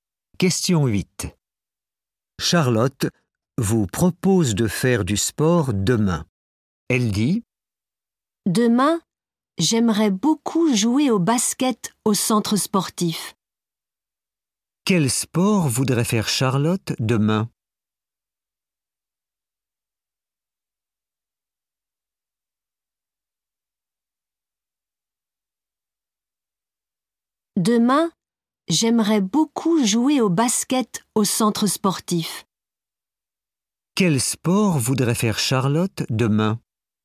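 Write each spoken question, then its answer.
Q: Quel sport voudrait faire Charlotte demain ?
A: Le basket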